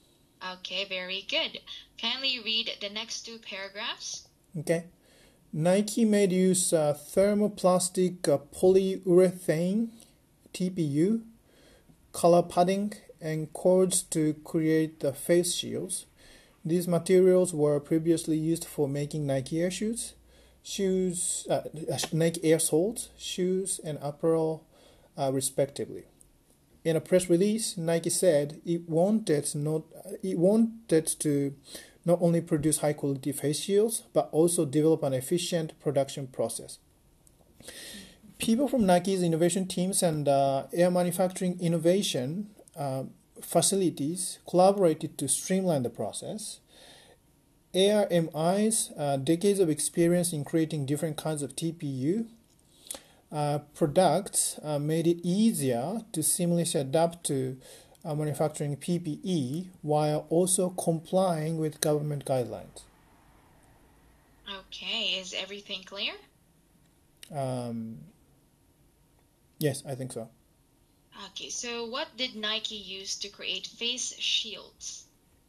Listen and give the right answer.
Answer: TPU, thermoplastic uh, plastic uh, polyurethane, cola padding, and cords uh, to create face shields.